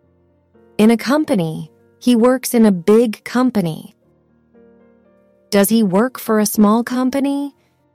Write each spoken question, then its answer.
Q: Does he work for a small company?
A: No, he doesn't.